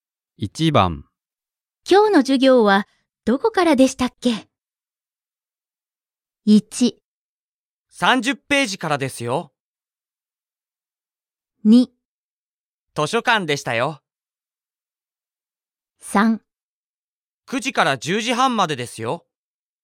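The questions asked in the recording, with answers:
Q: 今日の授業はどこからでしたっけ?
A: 1: 30ページからですよ。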